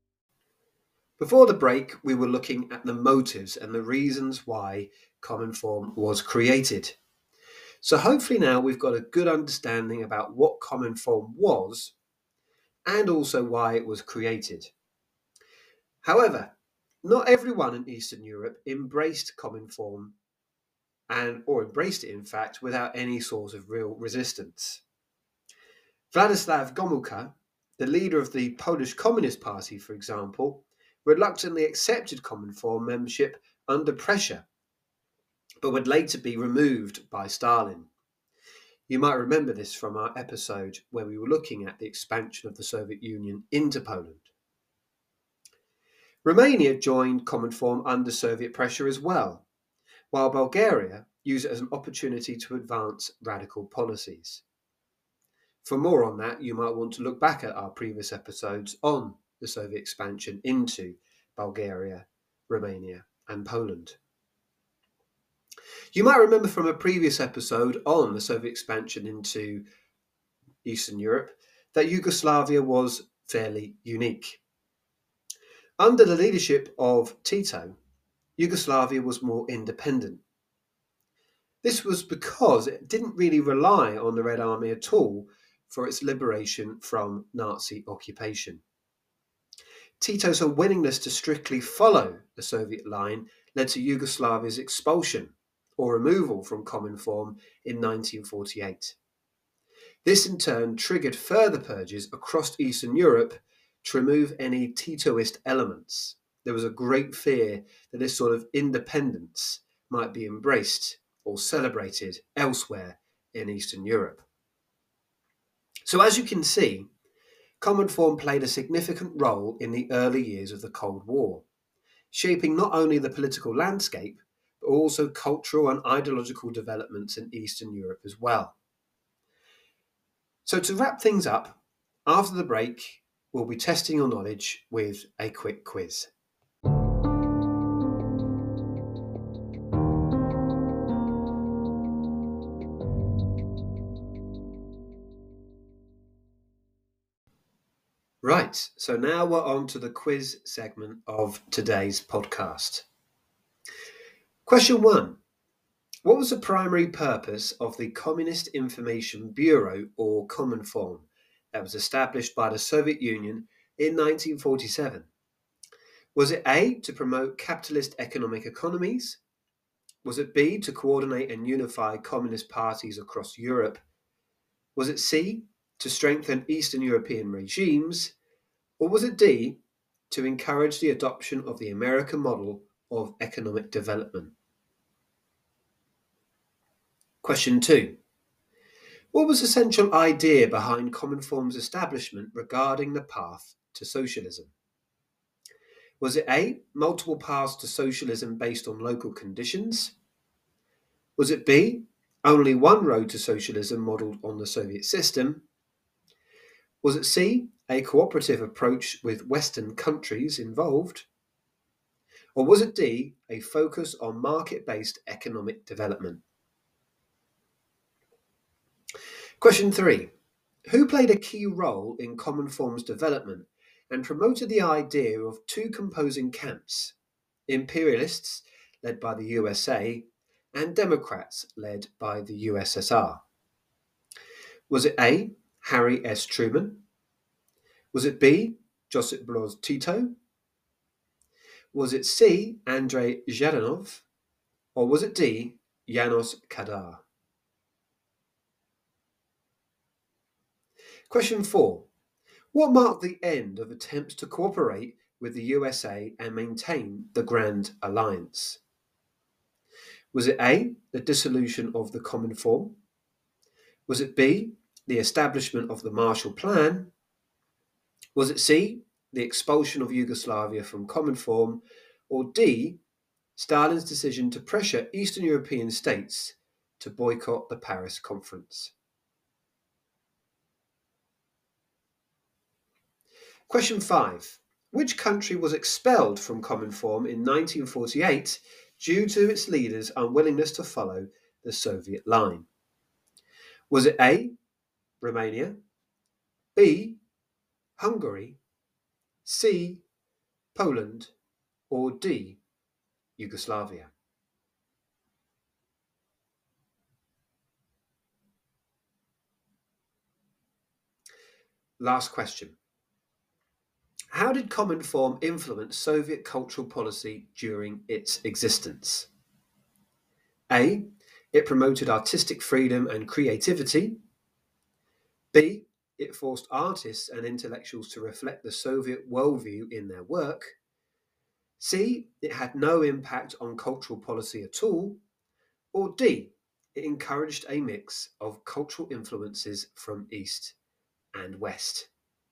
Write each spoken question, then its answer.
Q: Which country was expelled from Cominform in 1948 due to its leaders' unwillingness to follow the Soviet line?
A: So the correct answer there was D.